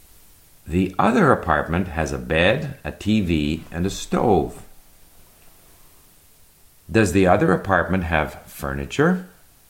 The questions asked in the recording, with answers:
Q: Does the other apartment have furniture?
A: Yes, the other apartment has a bed, a TV, and a stove.